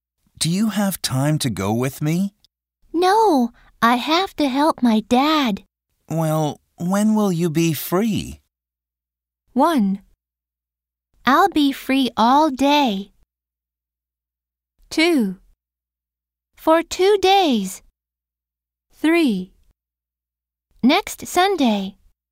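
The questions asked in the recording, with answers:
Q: Well, when will you be free?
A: 3: Next Sunday.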